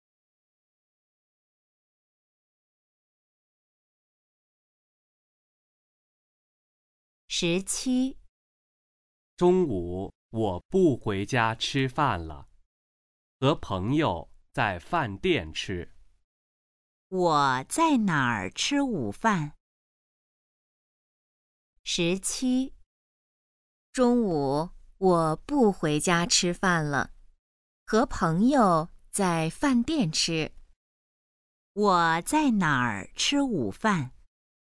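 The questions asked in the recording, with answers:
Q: 我在哪儿吃午饭?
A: 饭店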